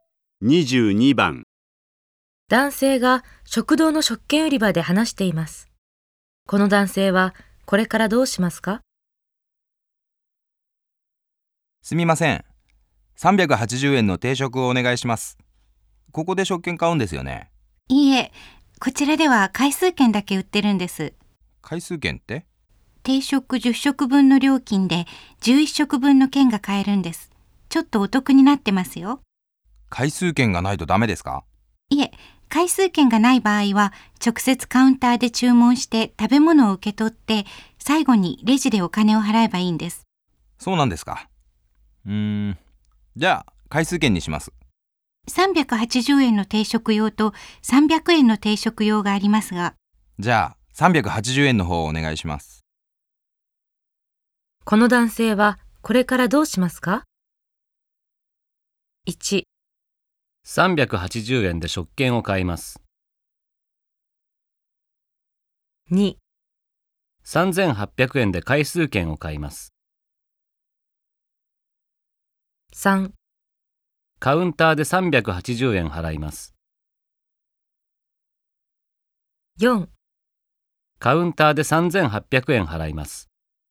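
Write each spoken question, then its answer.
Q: この男性はこれからどうしますか?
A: 2: 3800円で回数券を買います。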